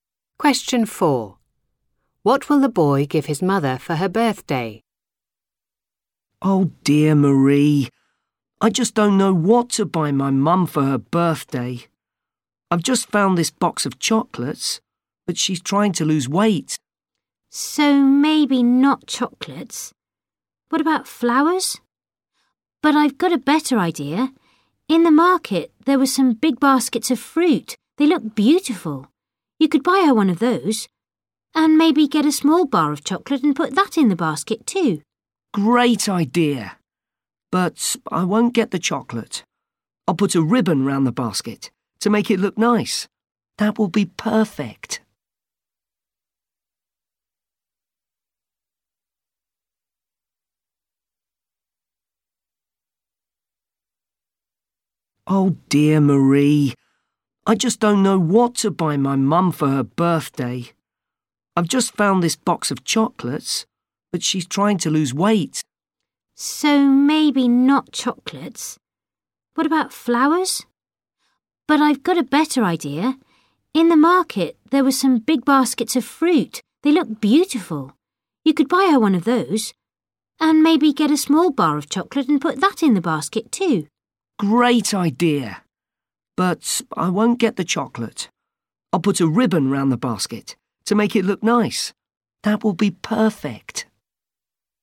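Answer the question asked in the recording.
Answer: a basket of fruit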